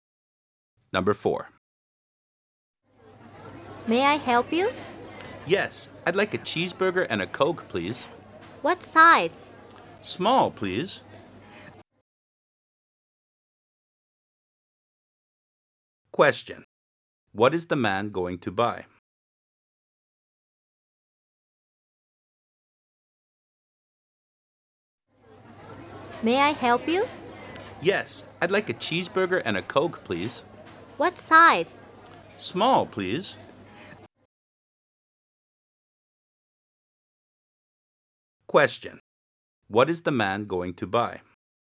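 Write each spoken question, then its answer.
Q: What is the man going to buy?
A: A cheeseburger and a small Coke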